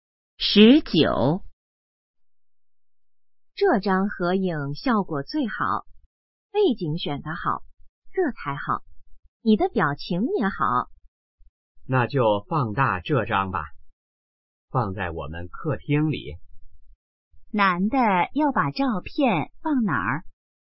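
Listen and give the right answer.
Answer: 客厅里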